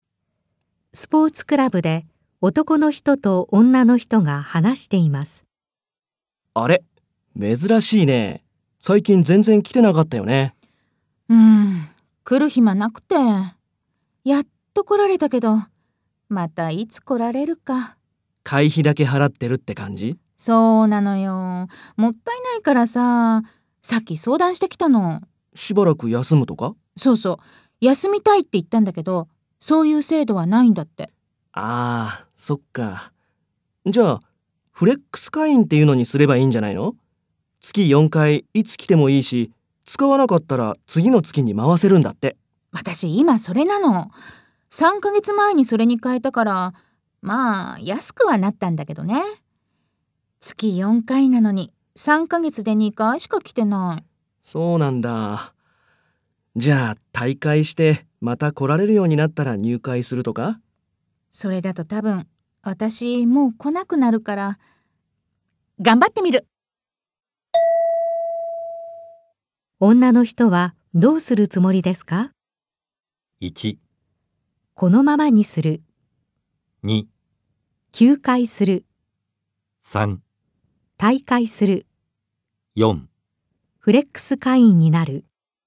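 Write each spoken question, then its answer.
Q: 女の人はどうするつもりですか?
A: 1: このままにする。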